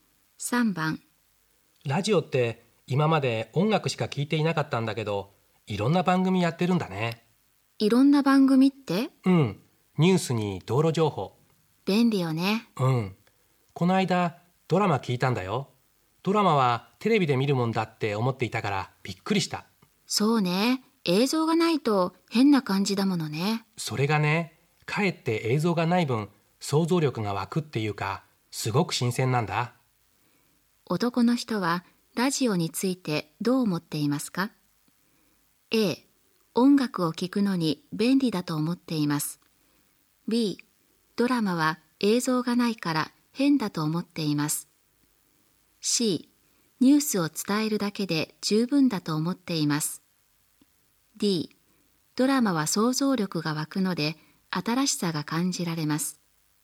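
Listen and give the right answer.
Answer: D: ドラマは想像力が湧くので新しさが感じられます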